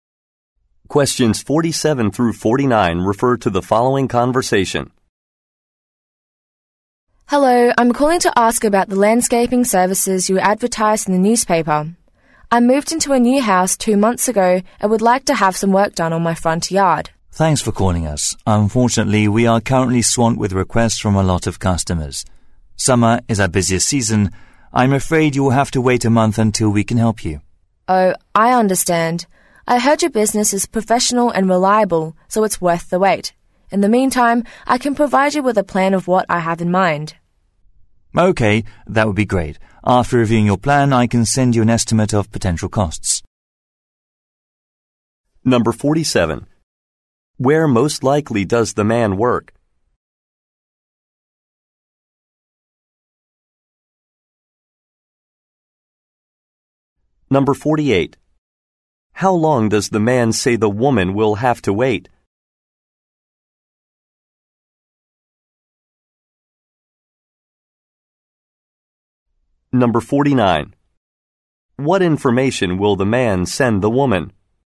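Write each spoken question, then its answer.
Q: Where most likely does the man work?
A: At a landscaping company

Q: How long does the man say the woman will have to wait?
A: A month

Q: What information will the man send the woman?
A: A cost estimate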